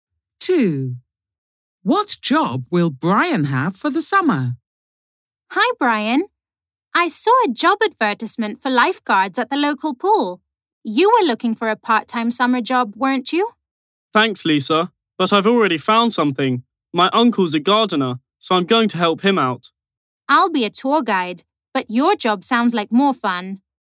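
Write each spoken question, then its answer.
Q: What job will Brian have for the summer?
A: Gardener (helping his uncle)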